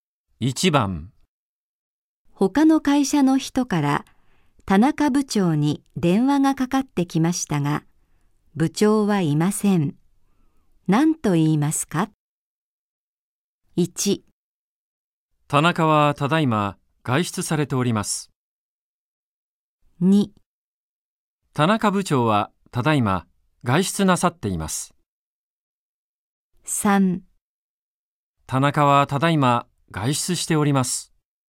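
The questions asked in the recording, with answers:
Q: 何と言いますか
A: 3: 田中はただいま外出しております。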